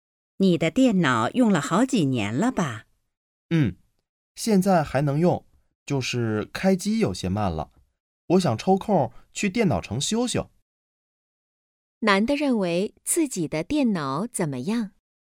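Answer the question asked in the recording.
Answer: 还能用,但开机有些慢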